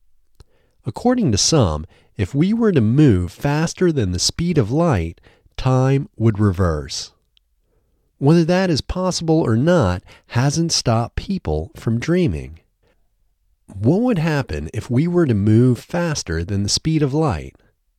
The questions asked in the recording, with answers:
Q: What would happen if we were to move faster than the speed of light?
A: If we were to move faster than the speed of light, time would reverse.